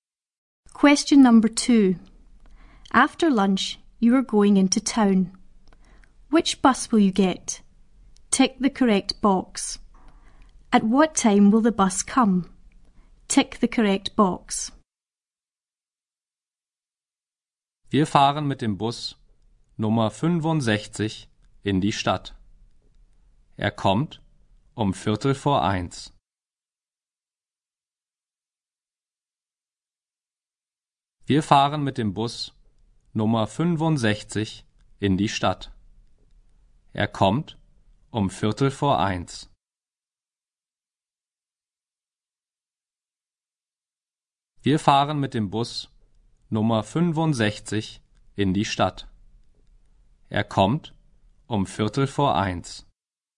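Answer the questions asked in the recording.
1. Bus number 65
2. 1:15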